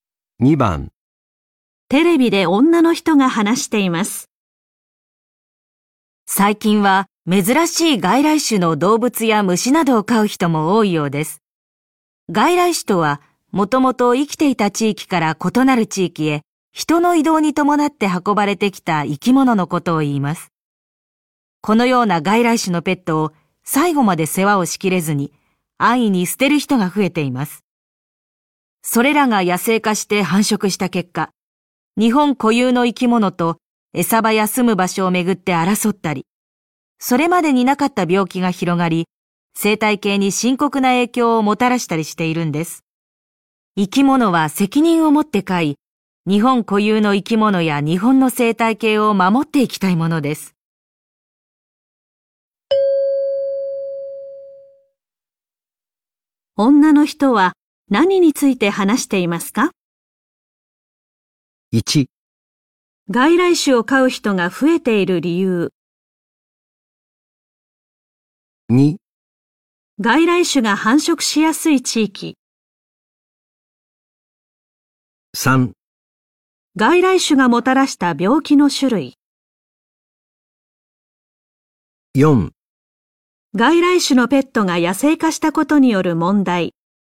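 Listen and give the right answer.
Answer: 4: 外来種のペットが野生化したことによる問題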